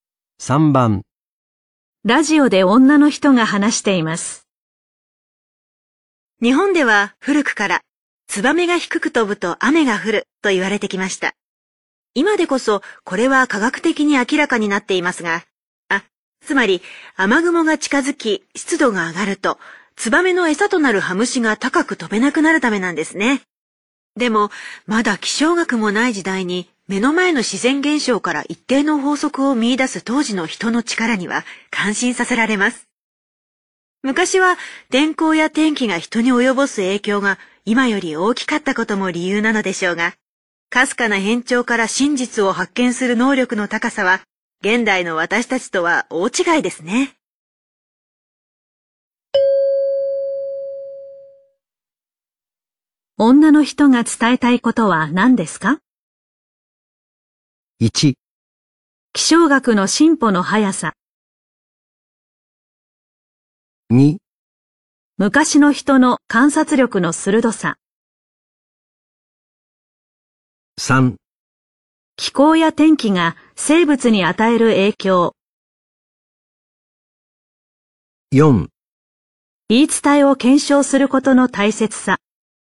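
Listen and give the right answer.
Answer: 2: 昔の人の観察力の鋭さ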